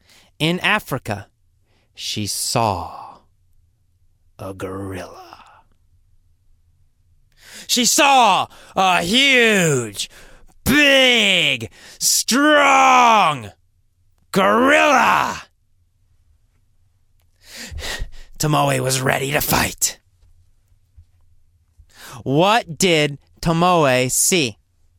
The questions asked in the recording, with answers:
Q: What did Tomoe see?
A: She saw a huge, strong, brute gorilla.